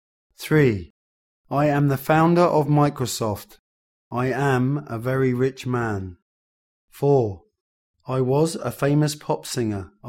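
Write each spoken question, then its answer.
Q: I am the founder of Microsoft. I am a very rich man.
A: Bill Gates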